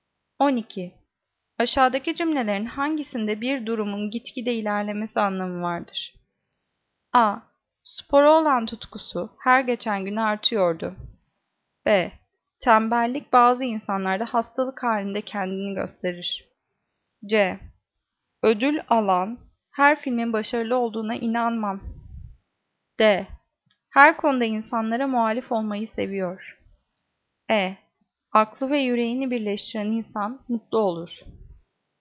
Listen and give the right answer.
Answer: Cevap A. Spora olan tutkusu her geçen gün artıyordu.